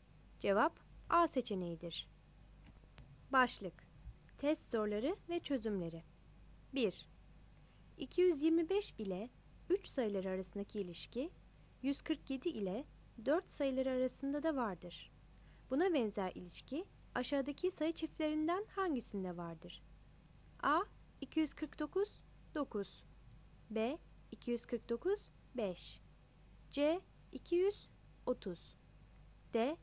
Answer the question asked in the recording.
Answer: Cevap B seçeneğidir.